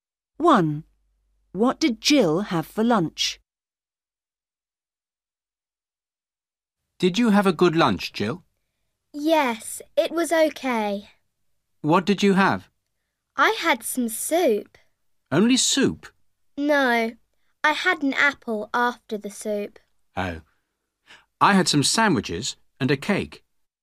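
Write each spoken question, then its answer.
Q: What did Jill have for lunch?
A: soup and an apple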